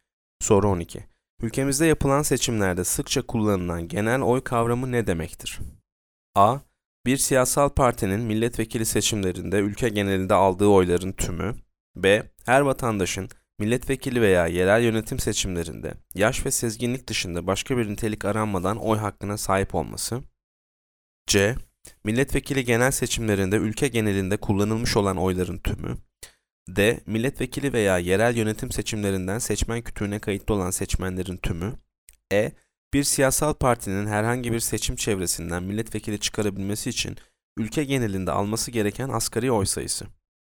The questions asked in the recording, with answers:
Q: Ülkemizde yapılan seçimlerde sıkça kullanılan genel oy kavramı ne demektir?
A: Yanıt B. Her vatandaşın milletvekili veya yerel yönetim seçimlerinde yaş ve sezginlik dışında başka bir nitelik aranmadan oy hakkına sahip olması.